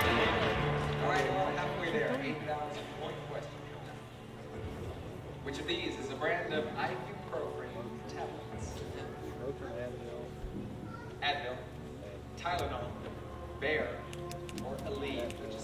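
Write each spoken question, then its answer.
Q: Which of these is a brand of ibuprofen tablets?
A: A: Advil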